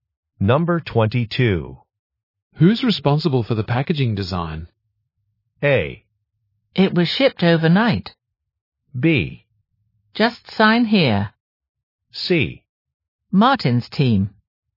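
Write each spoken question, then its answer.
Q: Who's responsible for the packaging design?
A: C: Martin's team.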